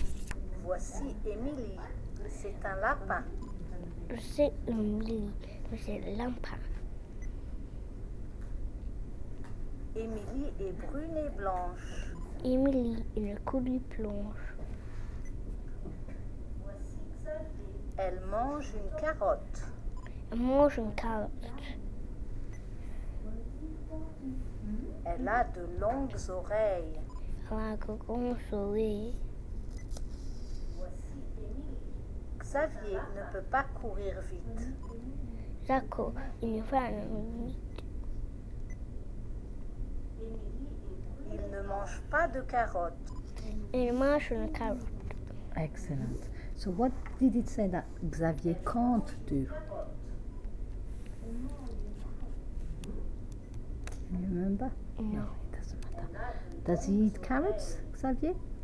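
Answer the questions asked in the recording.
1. Run fast
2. No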